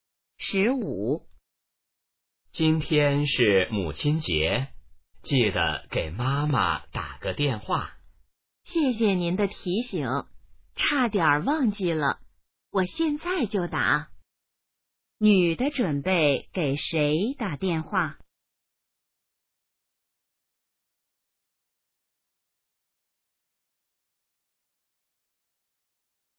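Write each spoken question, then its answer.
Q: 女的准备给谁打电话?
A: 妈妈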